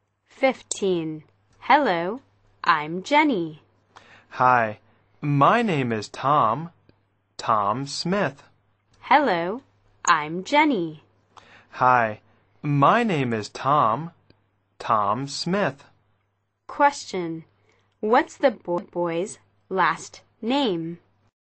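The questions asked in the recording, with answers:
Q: what's the boy's last name?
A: Smith.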